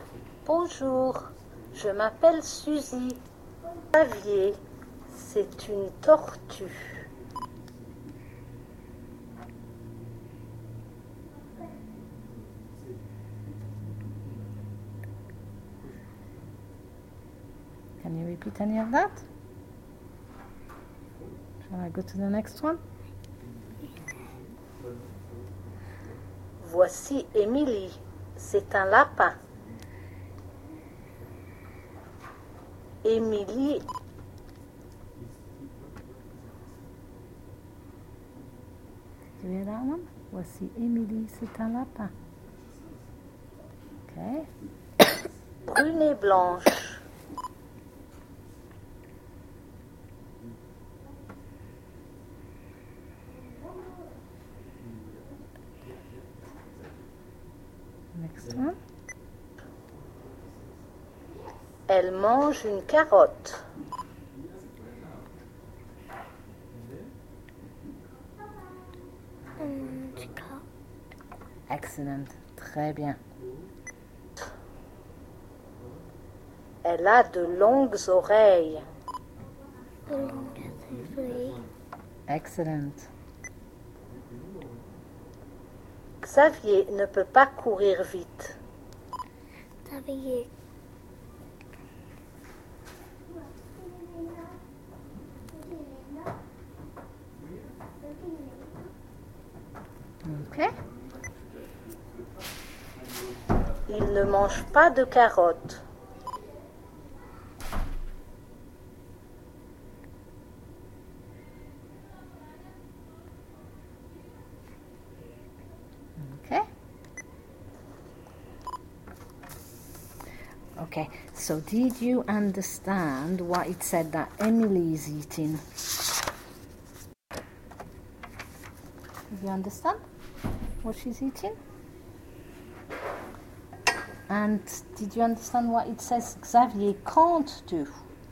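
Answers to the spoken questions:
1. A carrot
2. Run fast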